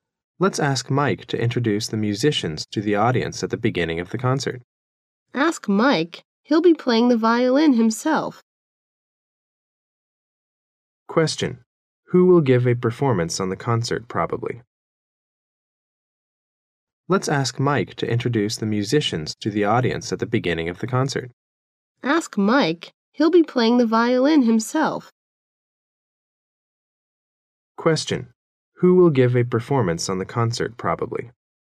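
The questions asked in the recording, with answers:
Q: Who will give a performance on the concert, probably?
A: Mike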